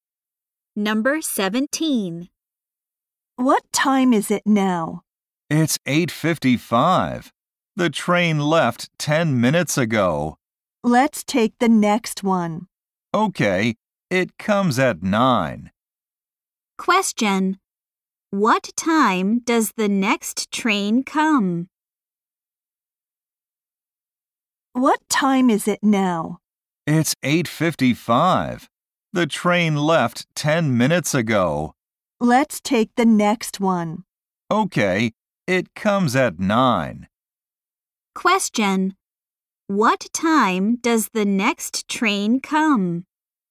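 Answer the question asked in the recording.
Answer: At 9:00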